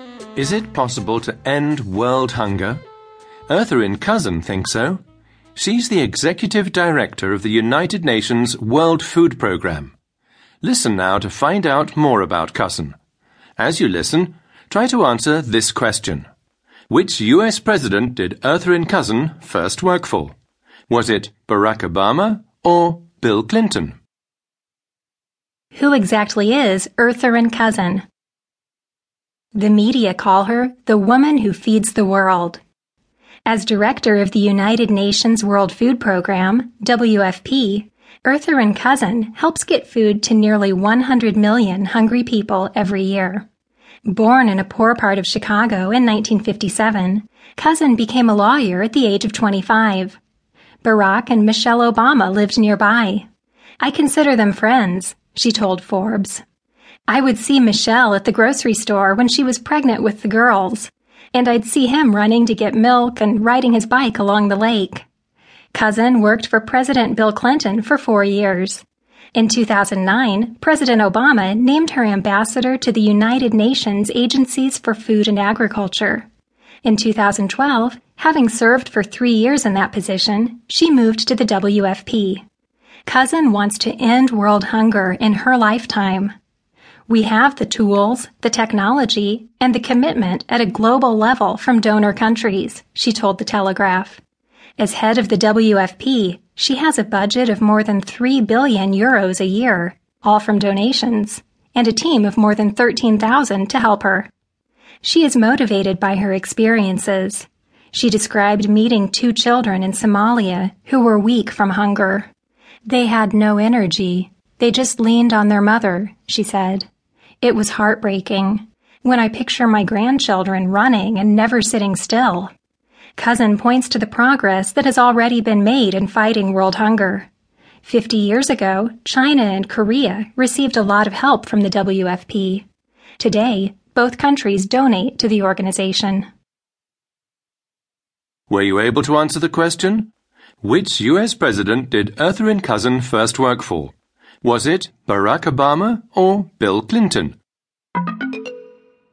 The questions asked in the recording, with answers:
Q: Which US president did Ertharin Cousin first work for?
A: It was Bill Clinton.